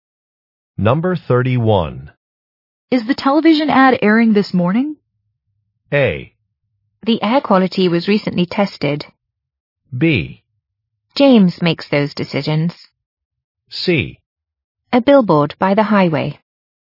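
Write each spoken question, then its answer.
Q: Is the television ad airing this morning?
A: B: James makes those decisions.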